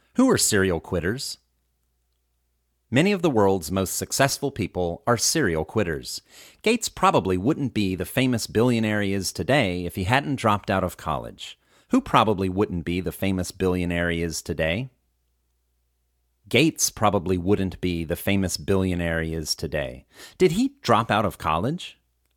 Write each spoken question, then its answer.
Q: Did he drop out of college?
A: Yes, he dropped out of college.